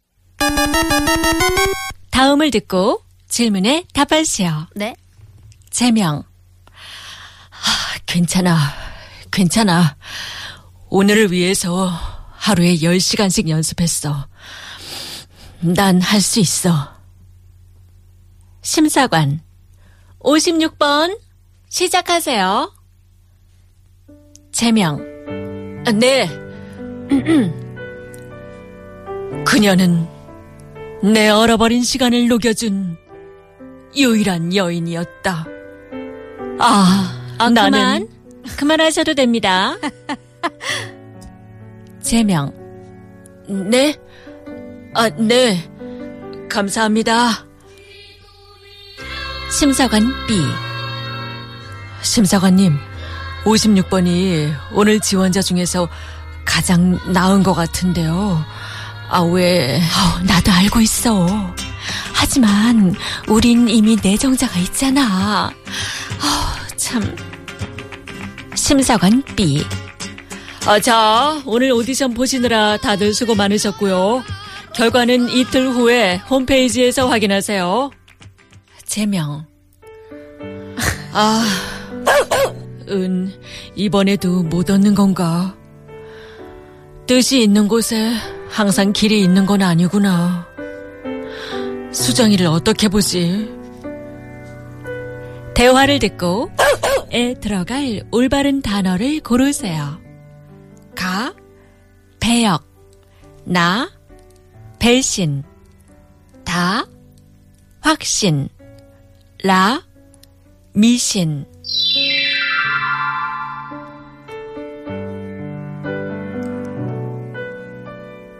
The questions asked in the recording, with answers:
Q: 대화를 듣고 에 들어갈 올바른 단어를 고르세요.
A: Ga, peyok은 이번에도 못 얻는 건가?